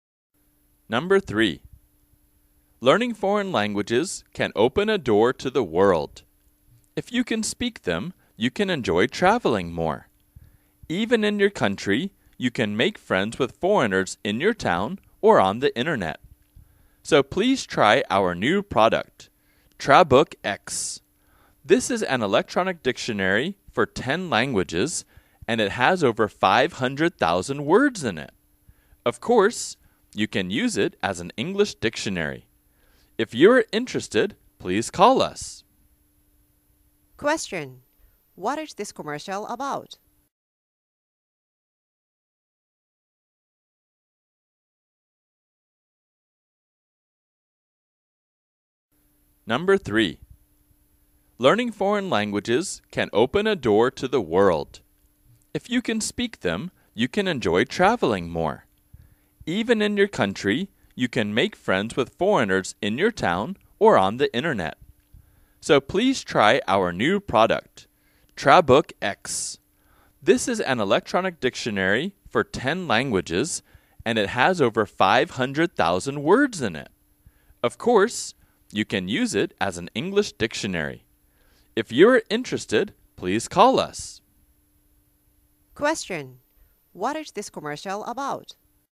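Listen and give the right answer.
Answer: An electronic dictionary (Trabook X) for 10 languages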